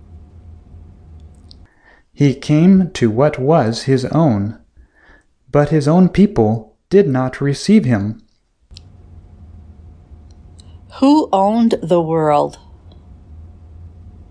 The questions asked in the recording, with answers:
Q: Who owned the world?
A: The Word owned the world.